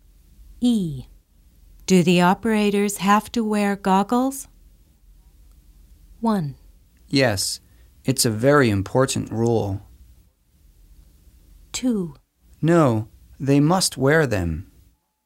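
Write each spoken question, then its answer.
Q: Do the operators have to wear goggles?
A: 1: Yes, it's a very important rule.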